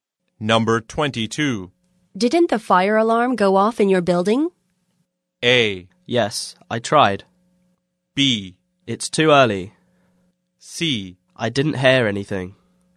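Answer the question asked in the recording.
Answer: C: I didn't hear anything.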